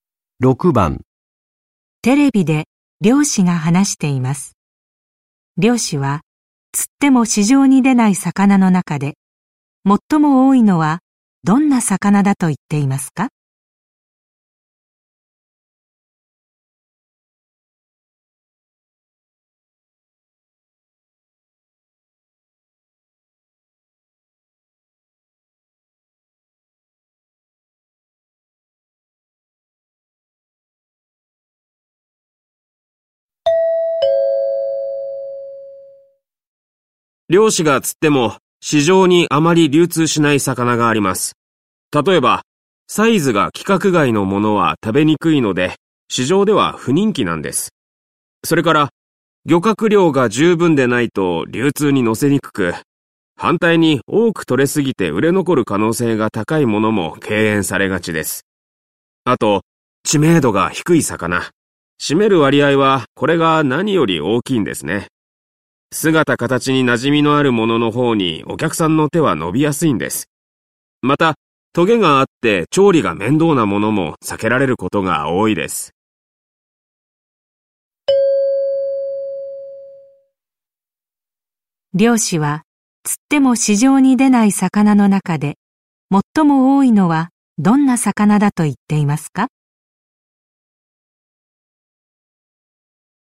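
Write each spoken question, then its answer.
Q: 漁師は、釣っても市場に出ない魚の中で、最も多いのはどんな魚だと言っていますか?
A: 知名度が低い魚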